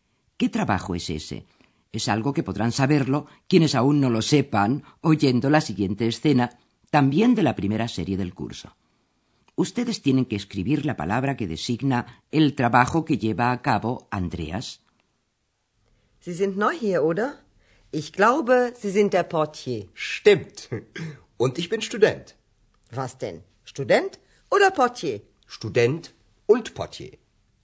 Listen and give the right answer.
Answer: Andreas se gana la vida como portier, como recepcionista.